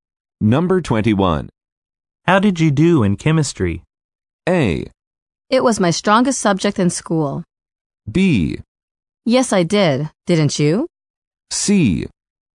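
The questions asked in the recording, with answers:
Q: How did you do in chemistry?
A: A: It was my strongest subject in school.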